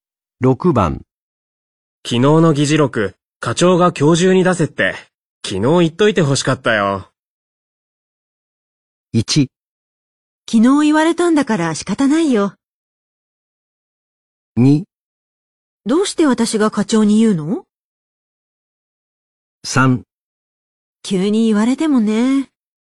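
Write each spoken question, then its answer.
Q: 昨日の議事録、課長が今日中に出せって、昨日言っといて欲しかったよ。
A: 3: 急に言われてもね。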